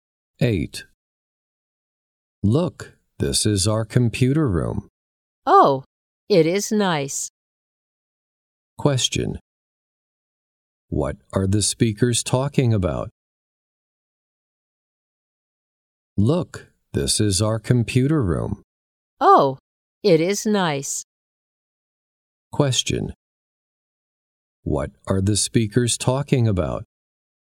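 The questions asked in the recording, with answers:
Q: What are the speakers talking about?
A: Their computer room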